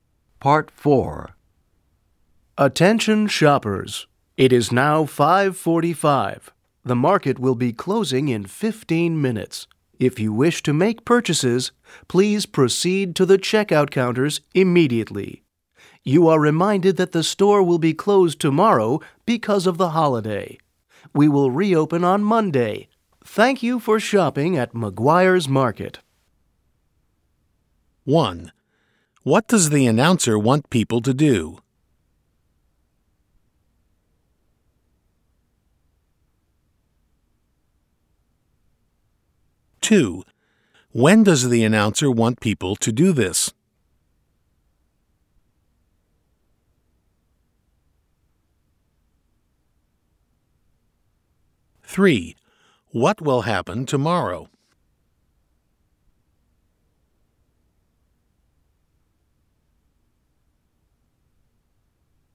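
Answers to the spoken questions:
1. Go to the checkout counters to make purchases
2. Immediately
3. The store will be closed for the holiday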